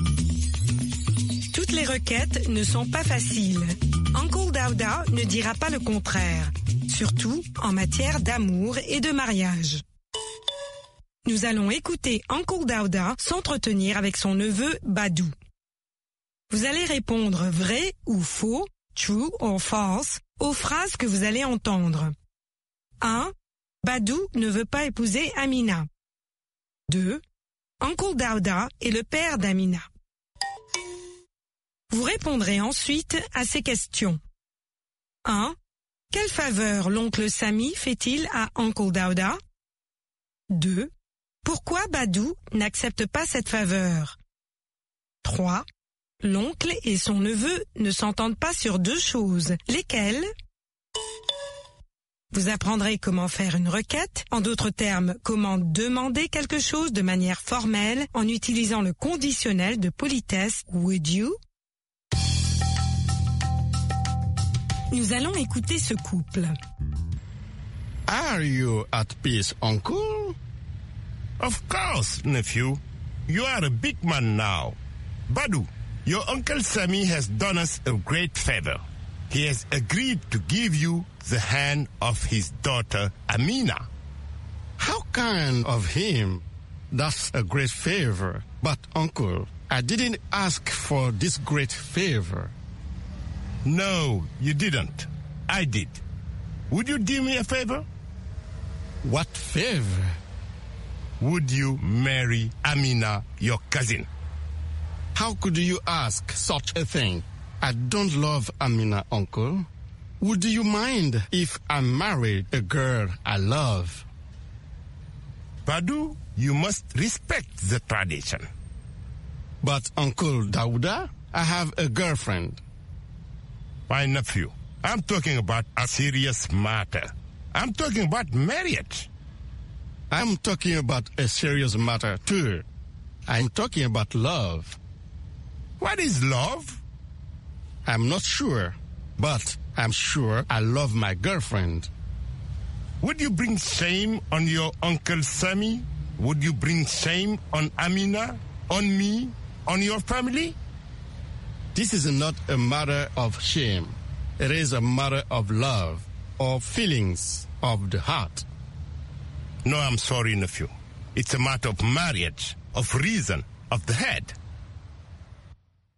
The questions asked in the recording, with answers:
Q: Badou ne veut pas épouser Amina.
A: L'énoncé 1 est vrai. Badou ne veut pas épouser Amina.

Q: Uncle Dauda est le père d'Amina.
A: L'énoncé 2 est faux. Uncle Dauda est le père d'Amina.

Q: Quelle faveur l'oncle Sami fait-il à Uncle Dauda?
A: Il accepte d'accorder la main de sa fille à Badou.

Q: L'oncle et son neveu ne s'entendent pas sur deux choses.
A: Sur le mariage et sur l'amour.